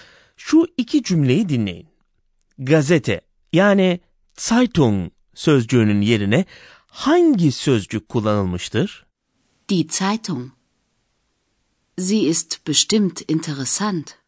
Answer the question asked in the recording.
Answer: Zeitung sözcüğünün yerine sie zamiri kullanılmış.